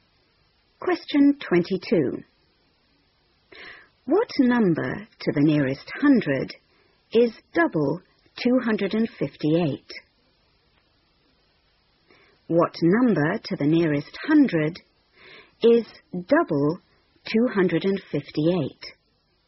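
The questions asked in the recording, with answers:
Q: What number to the nearest hundred is double 258?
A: 500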